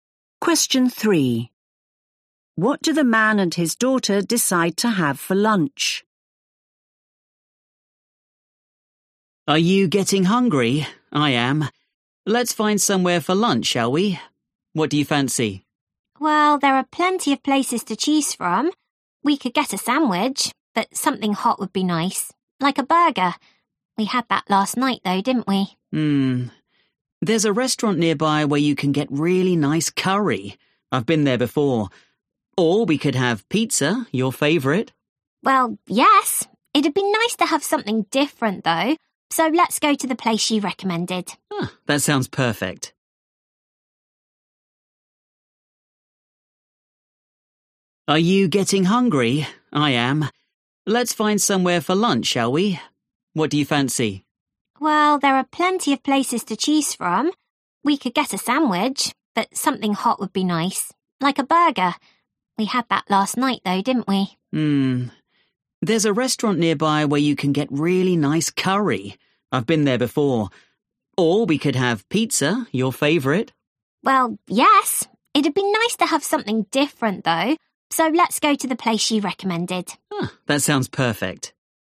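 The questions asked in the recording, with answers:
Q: What do the man and his daughter decide to have for lunch?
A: curry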